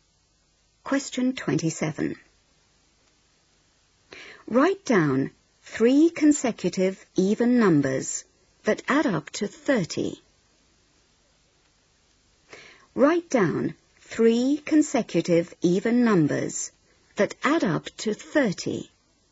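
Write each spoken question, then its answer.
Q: Write down three consecutive even numbers that add up to 30.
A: 8, 10, 12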